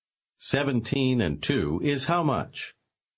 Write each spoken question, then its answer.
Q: 17 and 2 is how much?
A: 19.